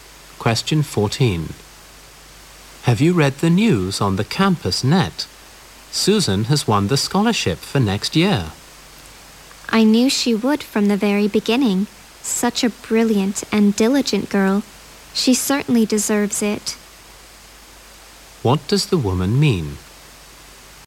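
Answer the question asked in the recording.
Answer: She isn't surprised Susan won the scholarship; Susan deserves it.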